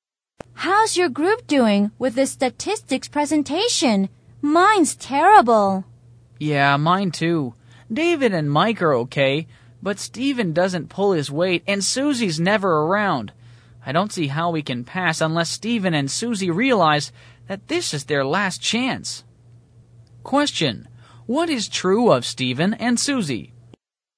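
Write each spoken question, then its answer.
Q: what is true of Stephen and Susie?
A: They are not doing their share of the group work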